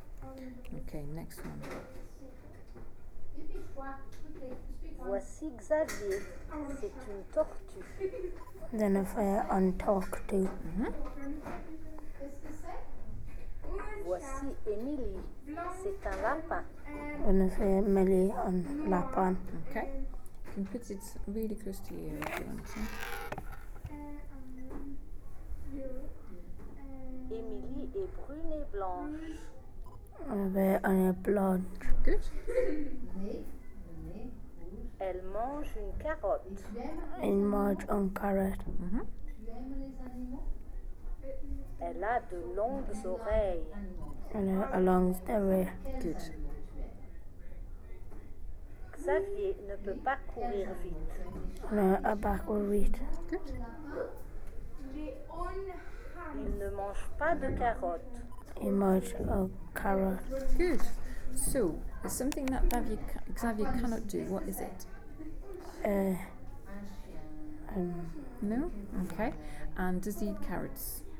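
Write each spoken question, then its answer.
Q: So, is something that Xavier cannot do, what is it?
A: Run fast

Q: And does he eat carrots?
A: No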